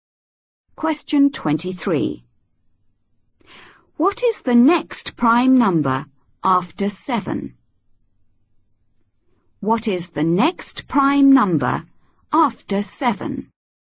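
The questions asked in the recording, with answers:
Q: What is the next prime number after 7?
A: 11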